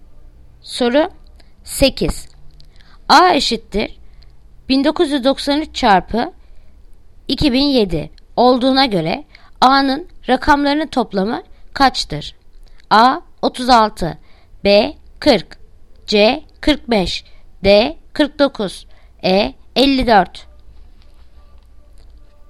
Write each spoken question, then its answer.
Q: A eşittir 1993 çarpı 2007 olduğuna göre A'nın rakamlarının toplamı kaçtır?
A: Yanıt Ceyhan 45